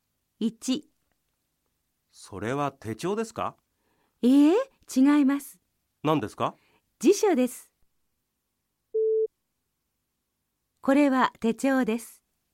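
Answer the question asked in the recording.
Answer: ×(辞書です)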